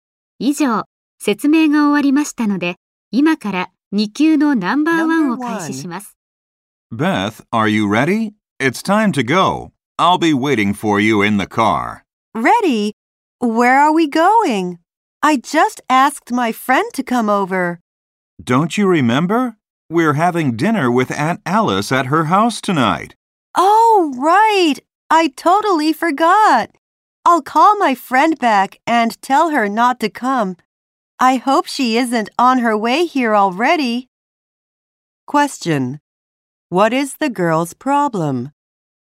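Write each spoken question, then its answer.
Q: What is the girl's problem?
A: She invited a friend over but forgot they are having dinner at Aunt Alice's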